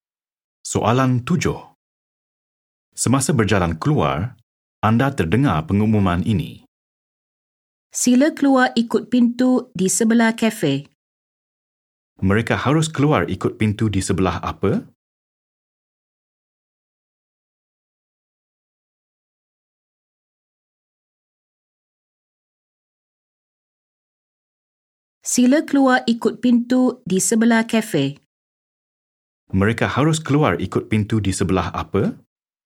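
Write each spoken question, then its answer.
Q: Mereka harus keluar ikut pintu di sebelah apa?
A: Kafe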